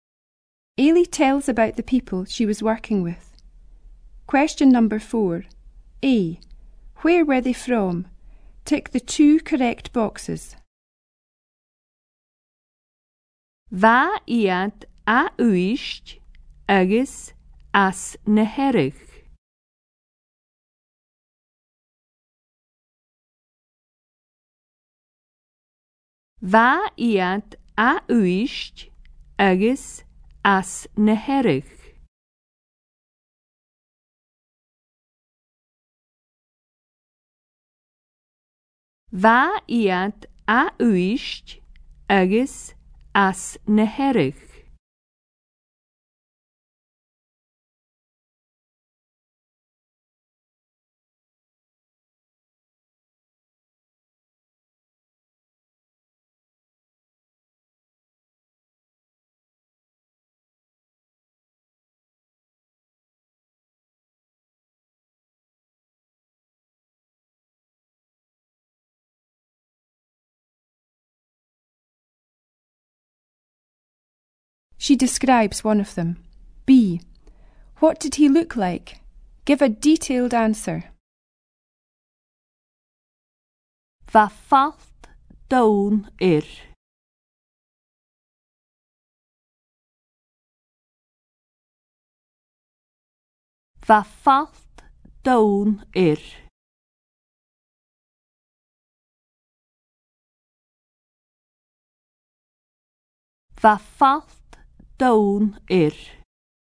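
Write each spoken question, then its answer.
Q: Where were they from?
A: Uist and Harris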